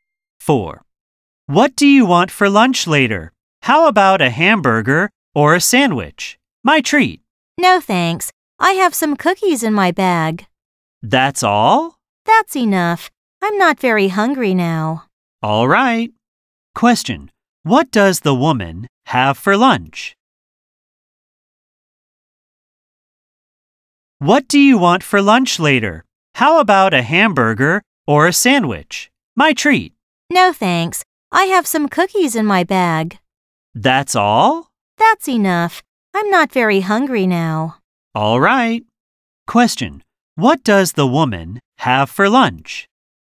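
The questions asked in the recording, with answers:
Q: What does the woman have for lunch?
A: Some cookies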